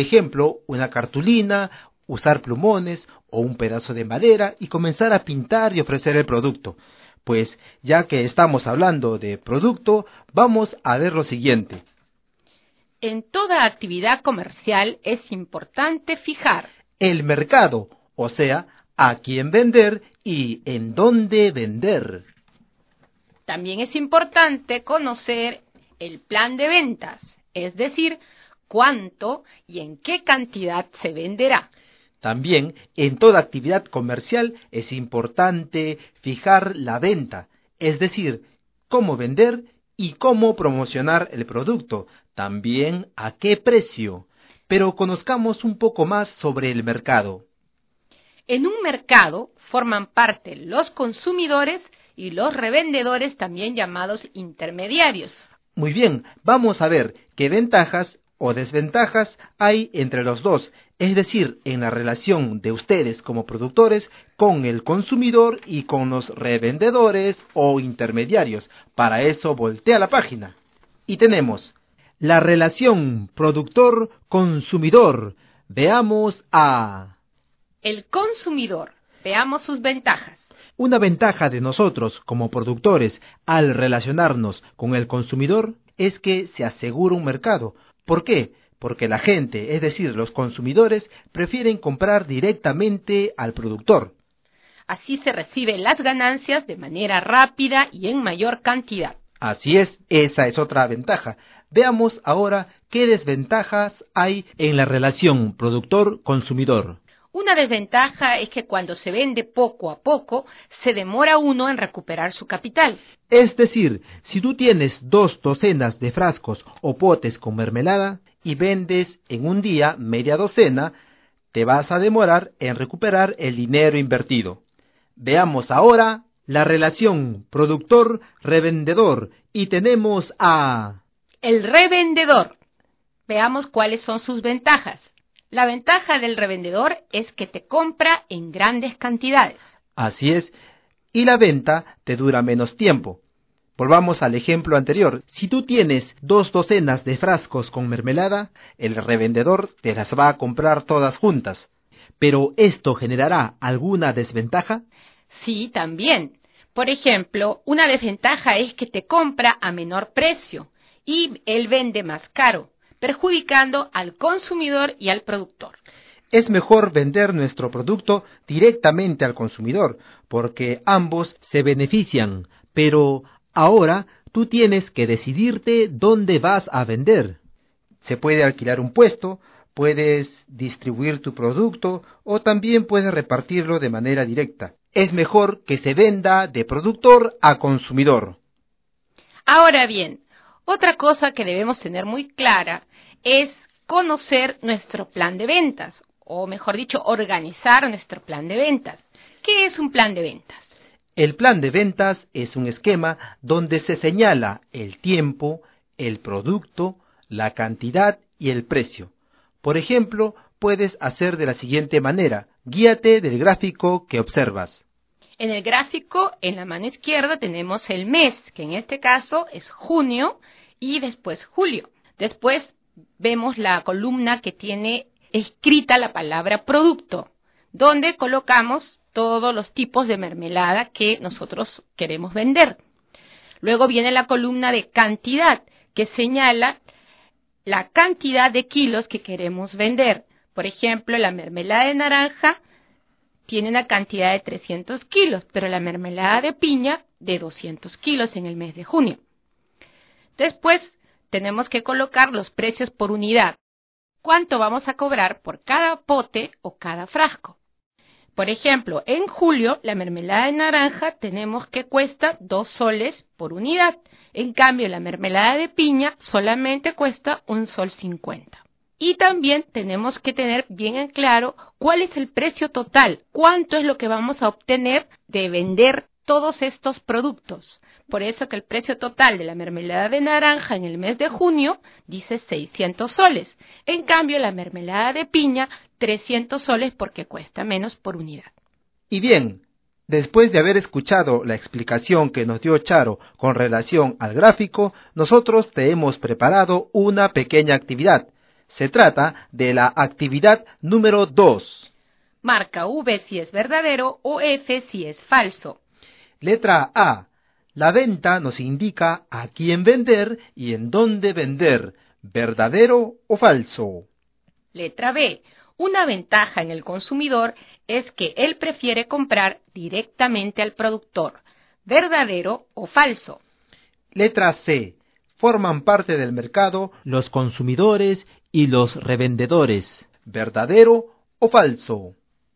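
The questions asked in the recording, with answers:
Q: Letra A. La venta nos indica a quién vender y en dónde vender, verdadero o falso.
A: Falso (eso lo indica el mercado)

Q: Letra B. Una ventaja en el consumidor es que él prefiere comprar directamente al productor, verdadero o falso.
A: Verdadero

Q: Letra C. Forman parte del mercado los consumidores y los revendedores, ¿verdadero o falso?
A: Verdadero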